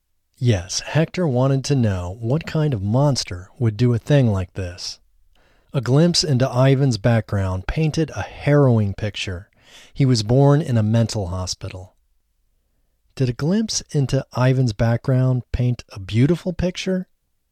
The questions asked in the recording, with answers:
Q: Did a glimpse into Ivan's background paint a beautiful picture?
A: No, a glimpse into Ivan's background didn't paint a beautiful picture.